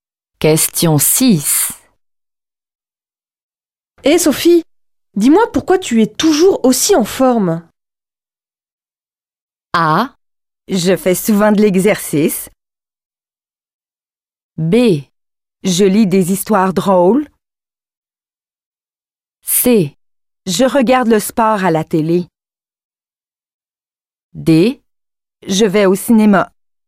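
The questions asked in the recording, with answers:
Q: Hé Sophie, dis-moi pourquoi tu es toujours aussi en forme?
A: A: Je fais souvent de l'exercice.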